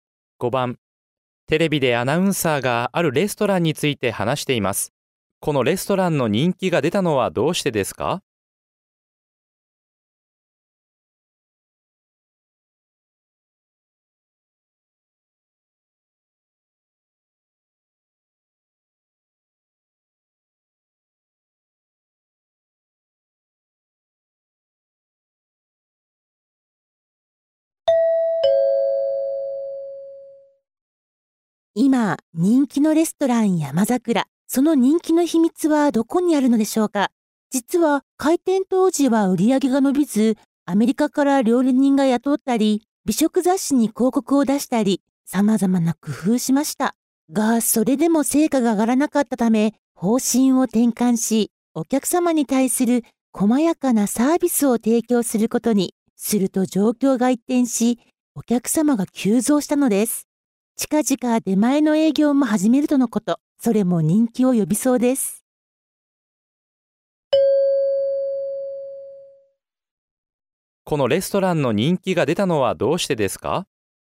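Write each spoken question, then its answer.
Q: このレストランの人気が出たのはどうしてですか?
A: お客様に細やかなサービスを提供するようにしたから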